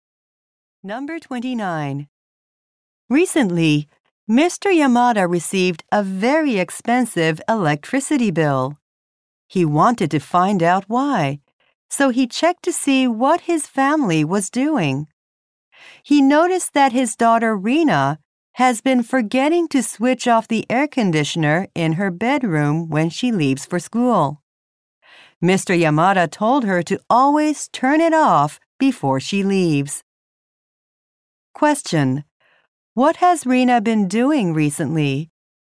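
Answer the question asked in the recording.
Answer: Forgetting to turn off her air conditioner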